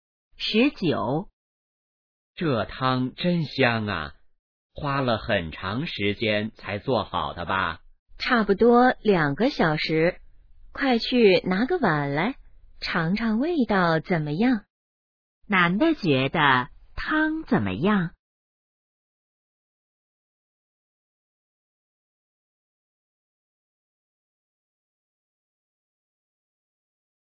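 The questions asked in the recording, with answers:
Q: 男的觉得汤怎么样?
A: 很香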